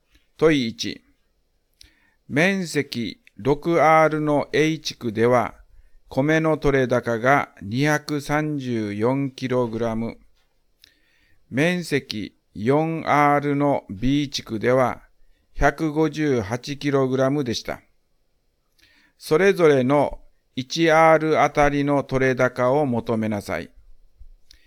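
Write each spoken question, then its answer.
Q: 面積 6R の A 地区では、米の取れ高が 234kg。面積 4R の B 地区では、158kg でした。それぞれの 1R あたりの取れ高を求めなさい。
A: A地区 39kg、B地区 39.5kg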